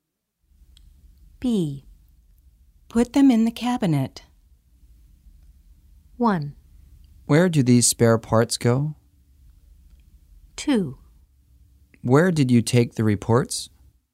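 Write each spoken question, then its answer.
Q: Put them in the cabinet.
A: 1: Where do these spare parts go?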